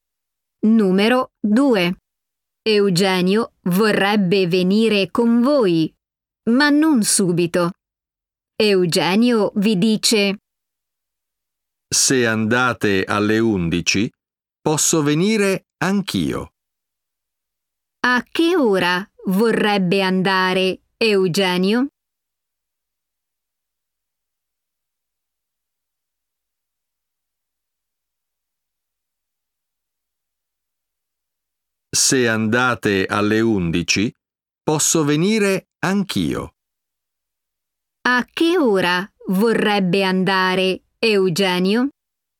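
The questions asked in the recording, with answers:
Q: A che ora vorrebbe andare Eugenio?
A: alle 11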